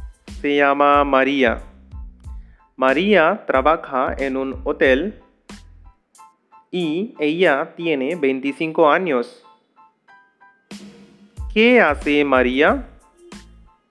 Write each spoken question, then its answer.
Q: ¿Qué hace María?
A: María trabaja en un hotel.